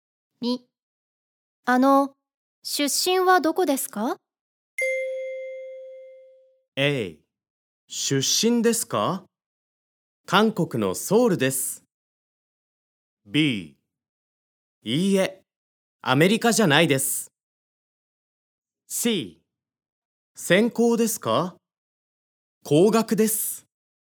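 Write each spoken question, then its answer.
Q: 出身はどこですか?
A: A: 出身ですか?韓国のソウルです。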